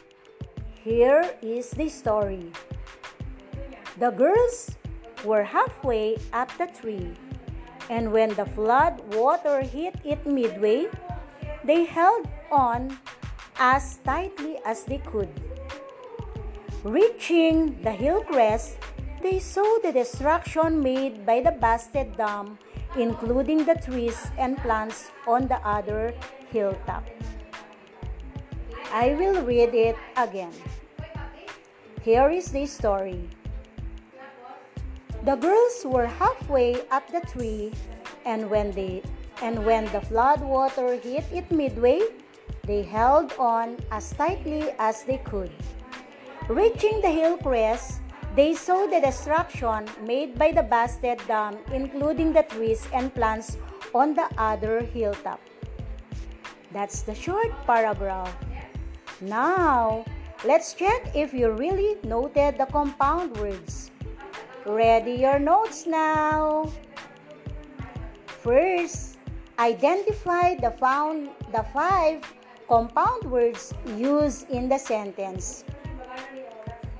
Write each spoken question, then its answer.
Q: First, identify the found the five compound words used in the sentence.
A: The compound words used in the paragraph are halfway, Floodwater, Midway, Hillcrest, and Hilltop.